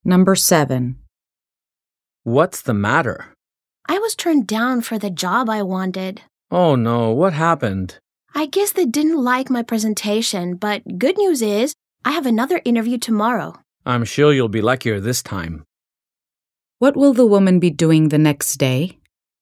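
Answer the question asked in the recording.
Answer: Going to another job interview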